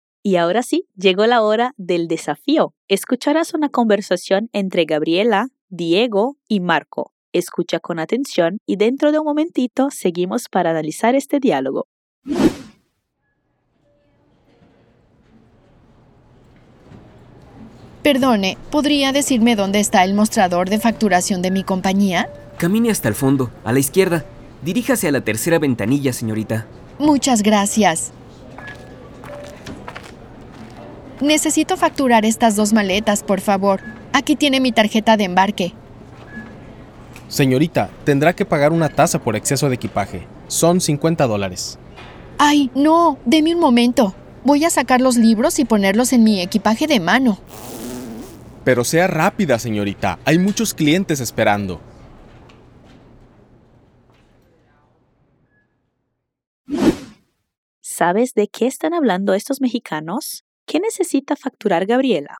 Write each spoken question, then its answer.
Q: ¿Qué necesita facturar Gabriela?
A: Dos maletas.